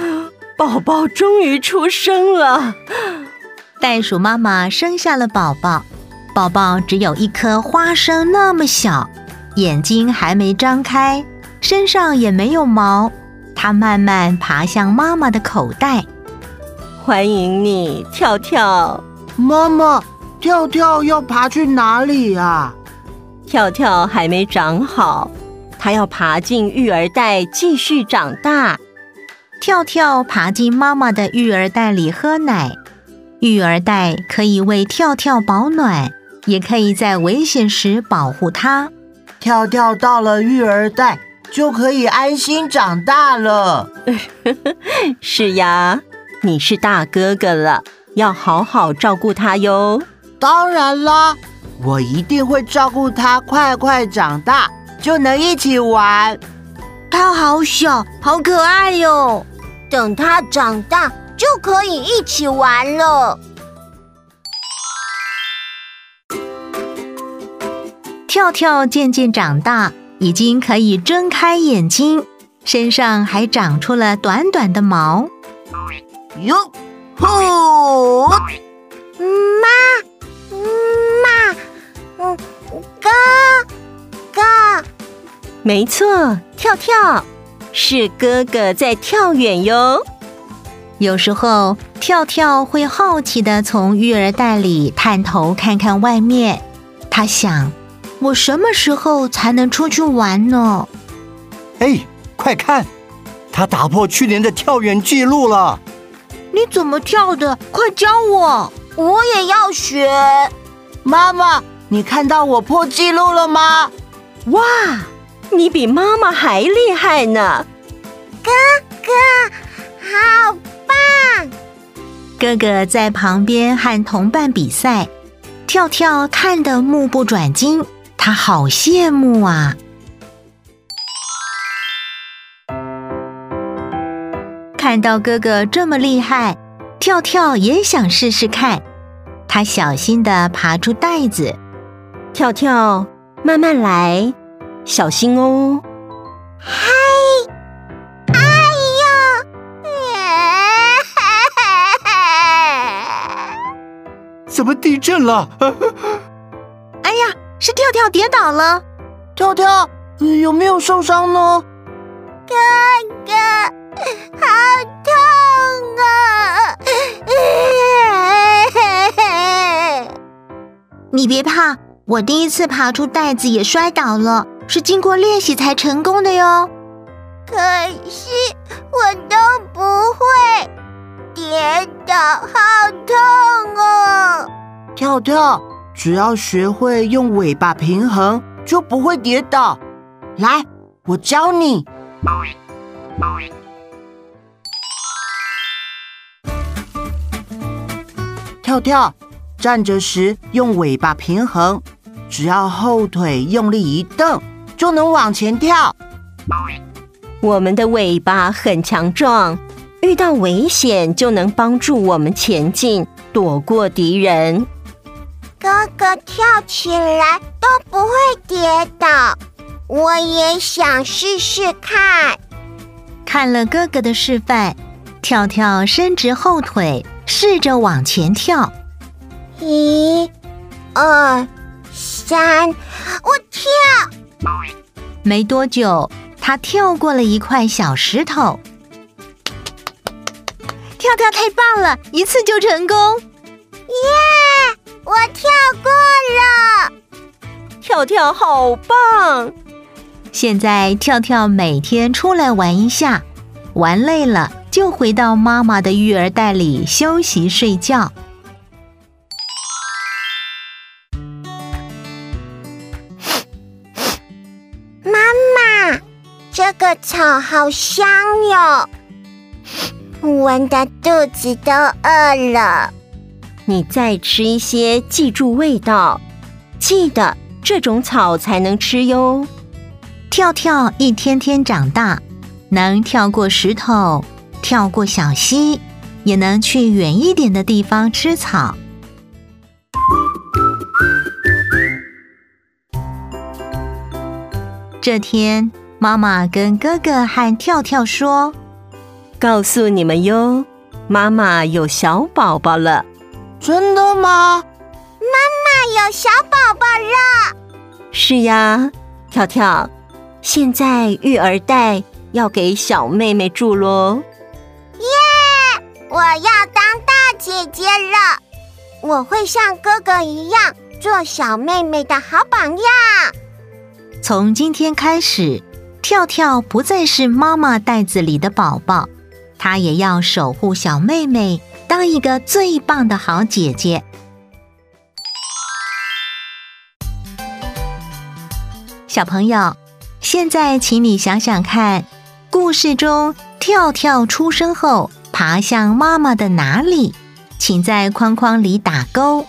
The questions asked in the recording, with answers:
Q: 故事中跳跳出生后爬向妈妈的哪里?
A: 育儿袋。